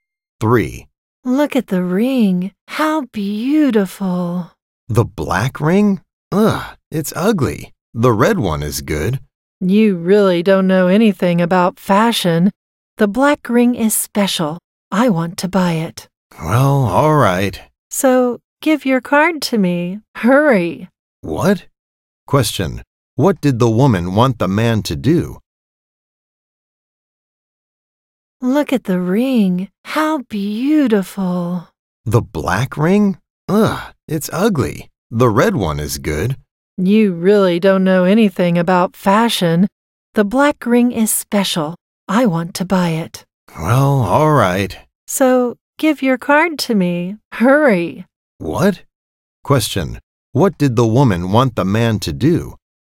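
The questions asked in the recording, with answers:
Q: What did the woman want the man to do?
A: Give her his card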